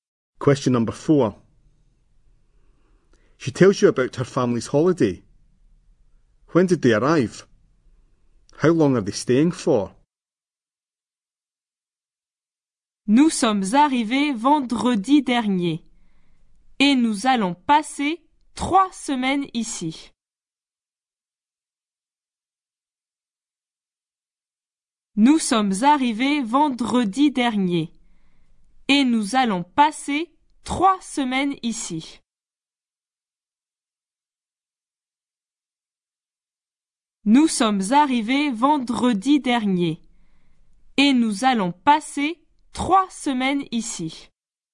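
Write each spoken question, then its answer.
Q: When did they arrive?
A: Last Friday

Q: How long are they staying for?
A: 3 weeks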